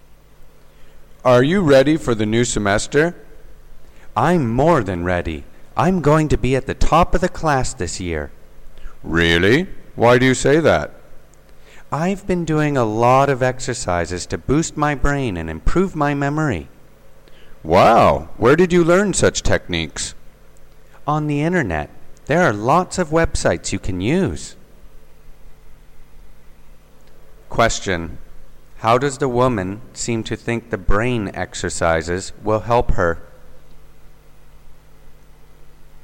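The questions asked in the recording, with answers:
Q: How does the woman seem to think the brain exercises will help her?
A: They will help her be at the top of her class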